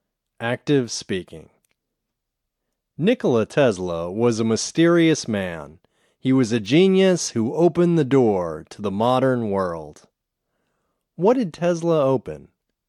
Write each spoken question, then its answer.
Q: What did Tesla open?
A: Tesla opened the door to the modern world.